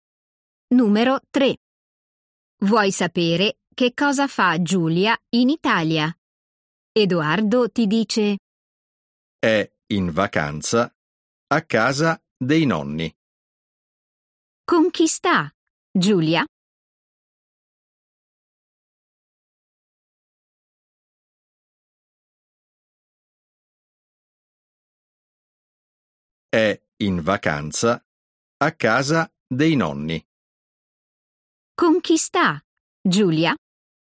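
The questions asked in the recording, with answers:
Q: Con chi sta Giulia?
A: con i nonni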